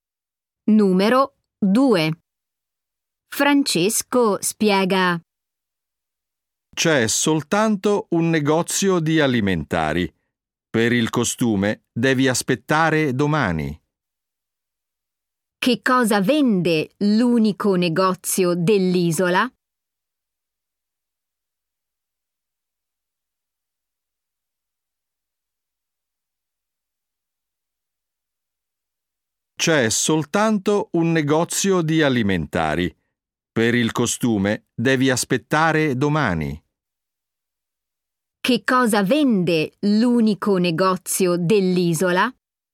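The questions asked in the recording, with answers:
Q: Che cosa vende l'unico negozio dell'isola?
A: Alimentari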